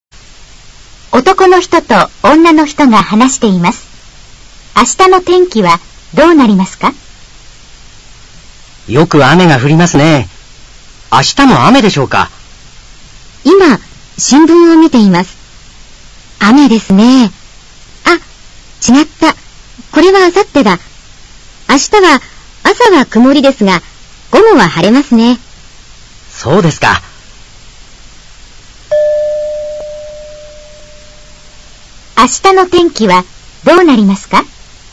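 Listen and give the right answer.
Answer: 朝は曇りで、午後は晴れます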